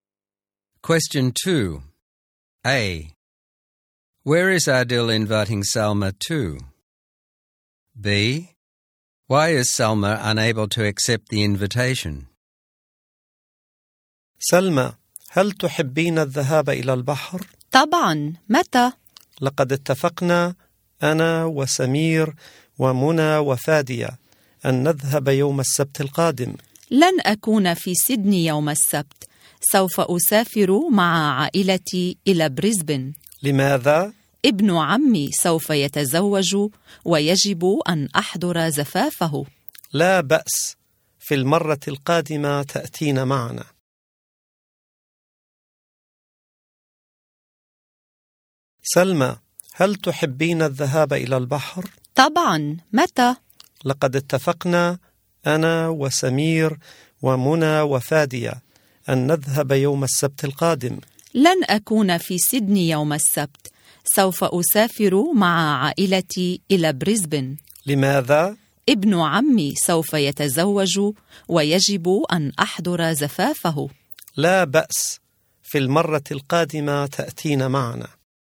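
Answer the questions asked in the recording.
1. To the beach, next Saturday
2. She is going to Brisbane with her family for her cousin's wedding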